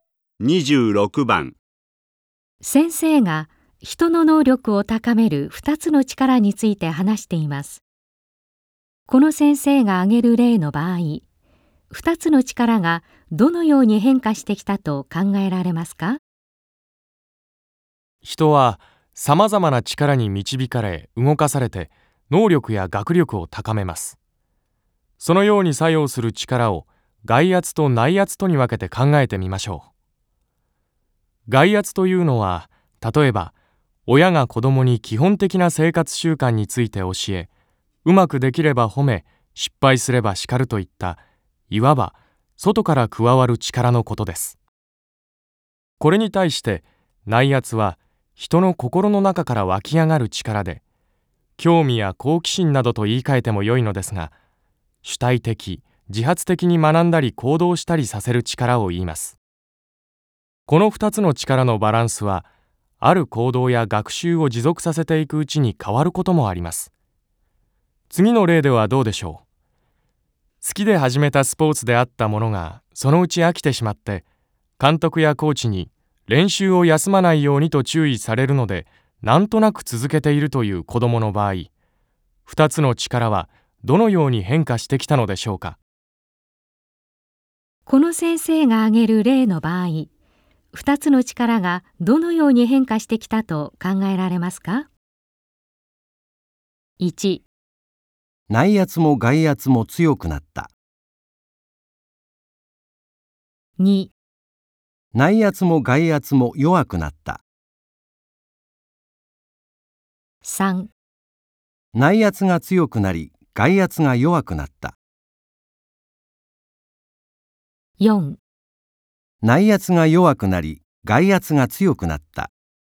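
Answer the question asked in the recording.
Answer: 4: 内圧が弱くなり外圧が強くなった。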